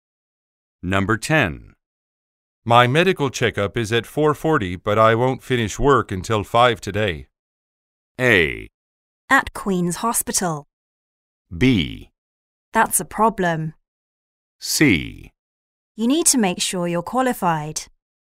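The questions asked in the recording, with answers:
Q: My medical checkup is at 4:40, but I won't finish work until 5 today.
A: B: That's a problem.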